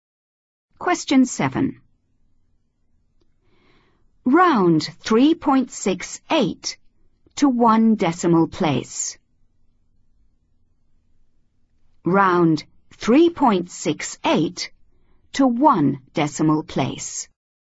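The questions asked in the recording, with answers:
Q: Round 3.68 to one decimal place.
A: 3.7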